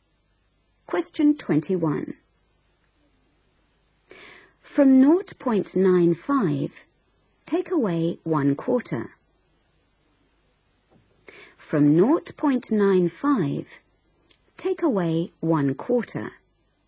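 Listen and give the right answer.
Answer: 0.7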